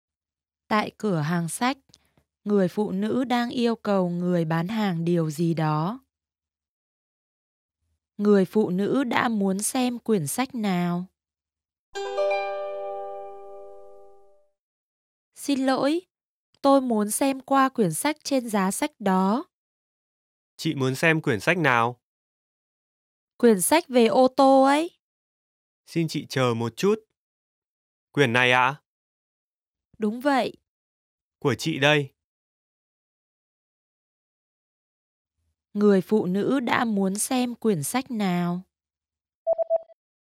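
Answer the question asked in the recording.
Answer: Quyển sách về ô tô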